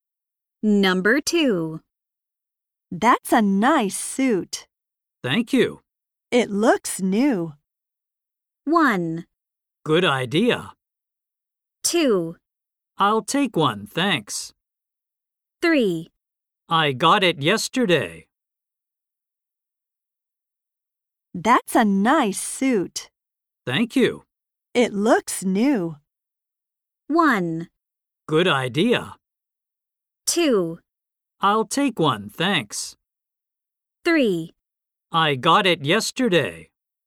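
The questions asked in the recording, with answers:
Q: It looks new.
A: 3: I got it yesterday.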